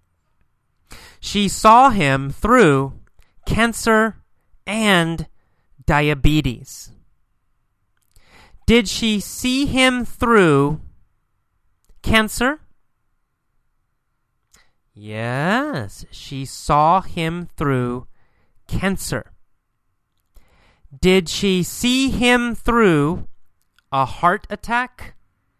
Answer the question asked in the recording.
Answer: No. Not a heart attack. She didn't see him through a heart attack.